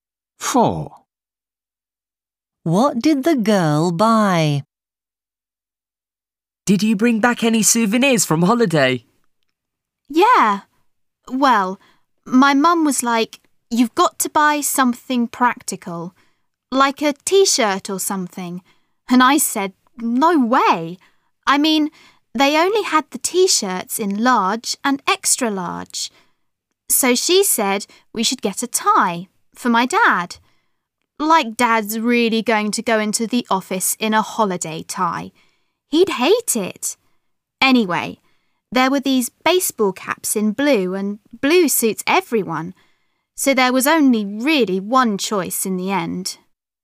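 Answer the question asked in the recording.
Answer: A blue baseball cap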